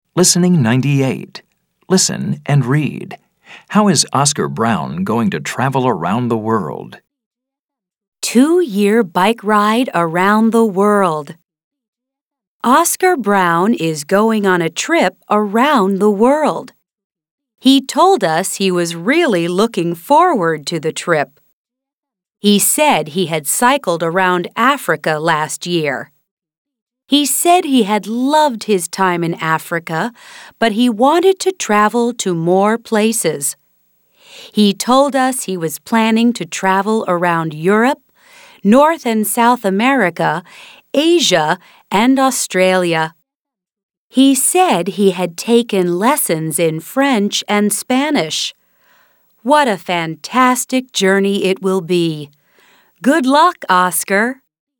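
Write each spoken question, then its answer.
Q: How is Oscar Brown going to travel around the world?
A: By bike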